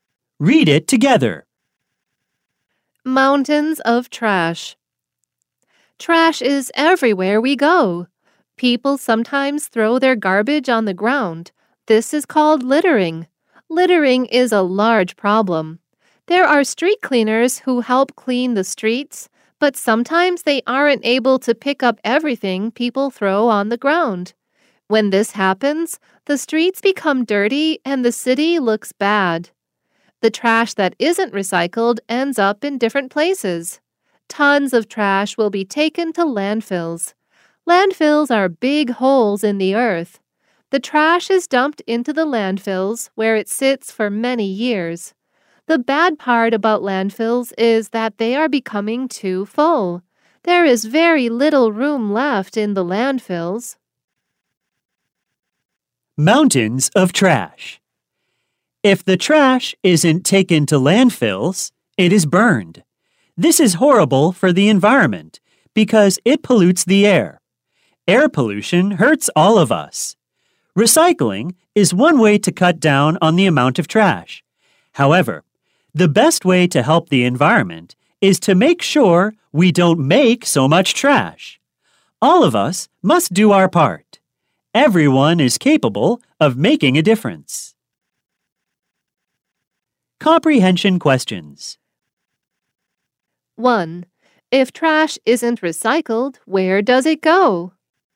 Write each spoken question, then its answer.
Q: If trash isn't recycled, where does it go?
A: It is taken to landfills or burned.